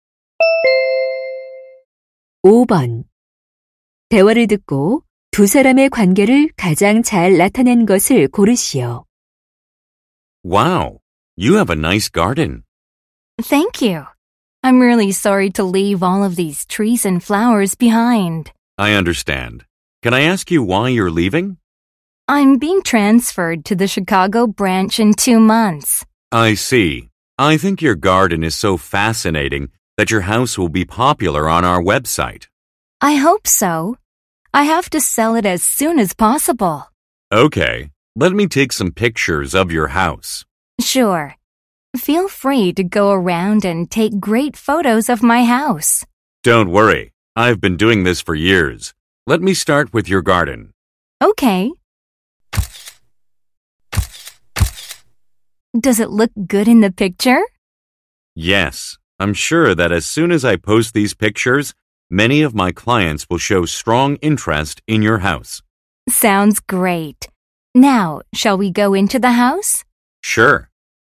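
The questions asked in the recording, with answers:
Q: 대화를 듣고 두 사람의 관계를 가장 잘 나타낸 것을 고르시오.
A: 부동산 중개인 - 집주인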